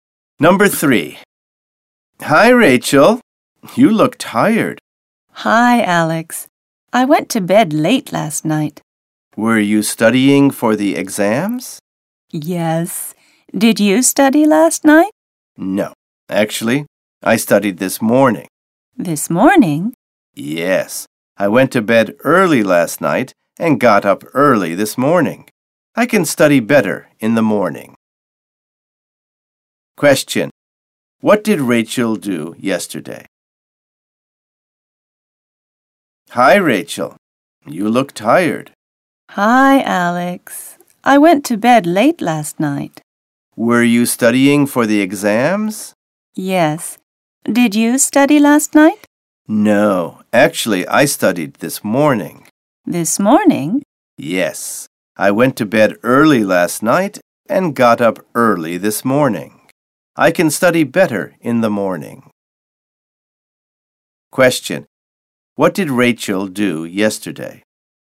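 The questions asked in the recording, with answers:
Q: What did Rachel do yesterday?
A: She studied for the exams and went to bed late.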